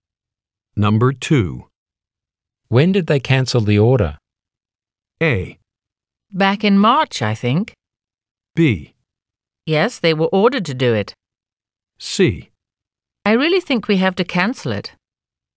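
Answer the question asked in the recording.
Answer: A: Back in March, I think.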